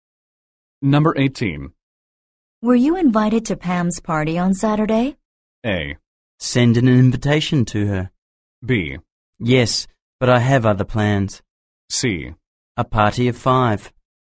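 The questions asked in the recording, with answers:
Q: Were you invited to Pam's party on Saturday?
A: B: Yes, but I have other plans.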